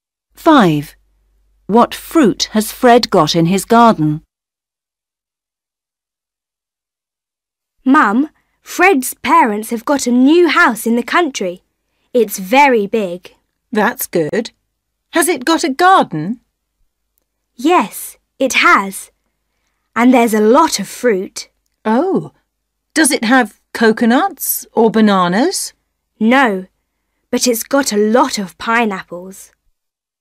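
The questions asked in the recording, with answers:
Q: What fruit has Fred got in his garden?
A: pineapples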